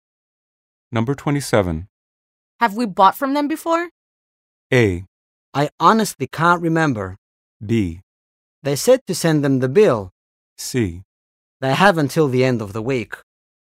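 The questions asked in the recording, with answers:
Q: Have we bought from them before?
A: A: I honestly can't remember.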